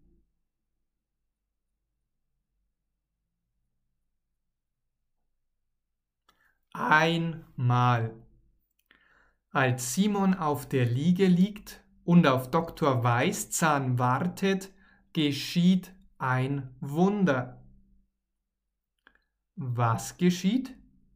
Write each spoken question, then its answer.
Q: Was geschieht?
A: Ein Wunder. Es geschieht ein Wunder, also etwas Gutes.